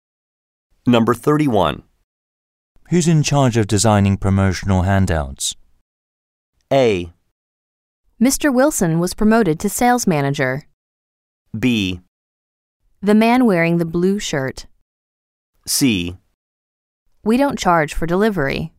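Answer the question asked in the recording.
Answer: B: The man wearing the blue shirt.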